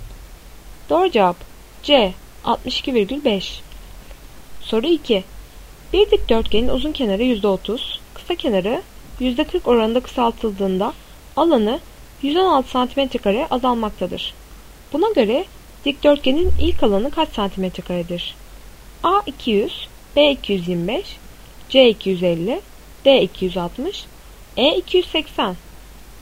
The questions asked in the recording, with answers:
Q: Buna göre dikdörtgenin ilk alanı kaç cm2'dir?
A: Doğru cevap A. 200.